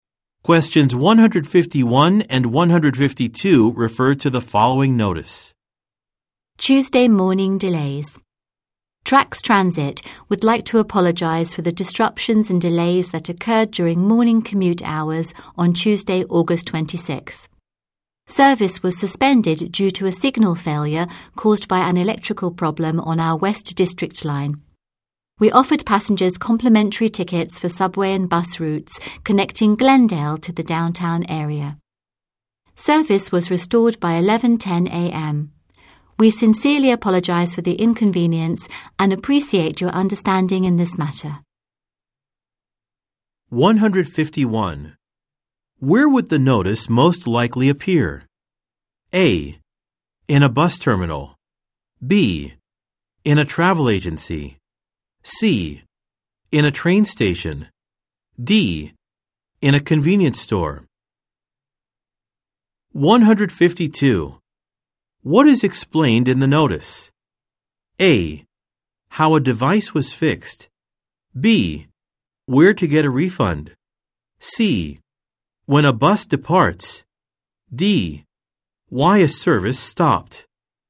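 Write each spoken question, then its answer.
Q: Where would the notice most likely appear?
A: C: In a train station.

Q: What is explained in the notice?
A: D: Why a service stopped.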